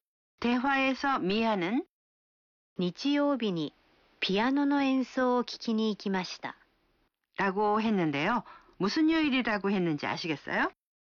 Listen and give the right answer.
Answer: 일요일이요.